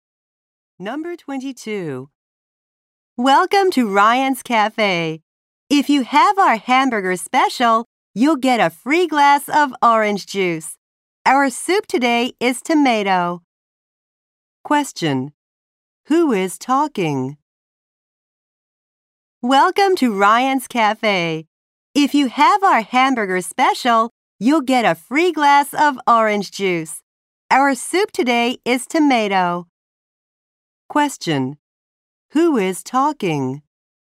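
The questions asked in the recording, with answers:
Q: Who is talking?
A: A worker at a cafe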